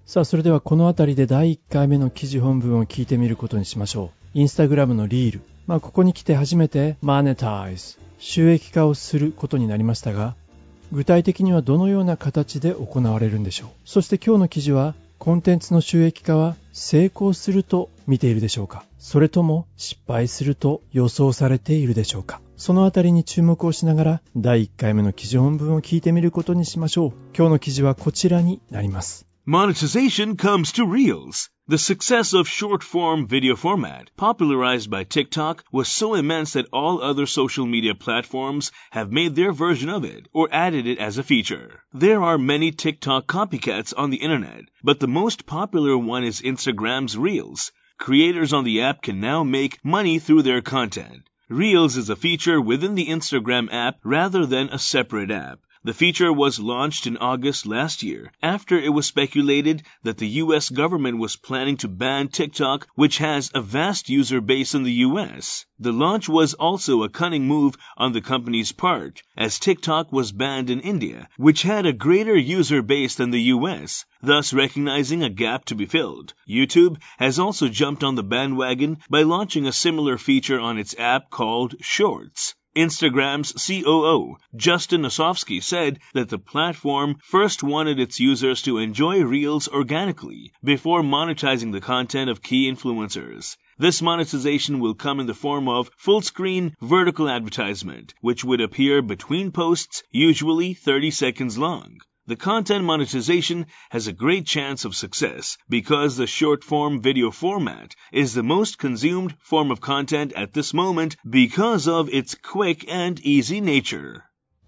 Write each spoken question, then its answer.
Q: 収益化をすることになりましたが、具体的にはどのような形で行われるんでしょう。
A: This monetization will come in the form of full screen vertical advertisement.

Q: そして今日の記事は、コンテンツの収益化は成功すると見ているでしょうか。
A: 少し長かったんですが、このコンテンツの monetization 収益化というのは has a great chance of success 成功する可能性が高いと考えられている。